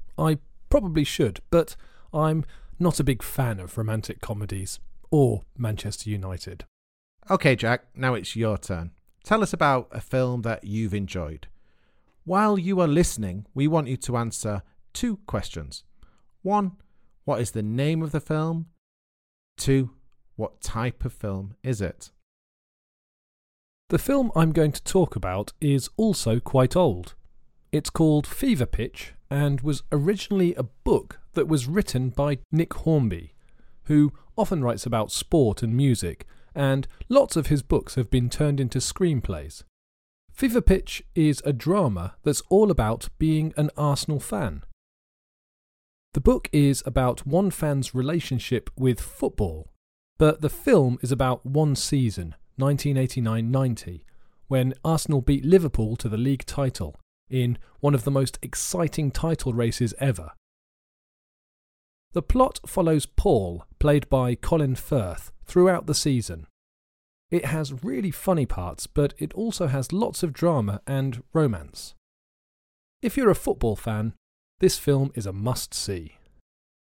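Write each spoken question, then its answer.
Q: what is the name of the film?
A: Fever Pitch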